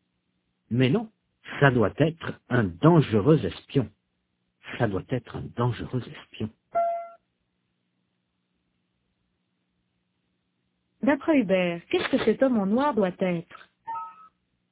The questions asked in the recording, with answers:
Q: D'après Hubert, qu'est-ce que cet homme en noir doit être?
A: Un dangereux espion?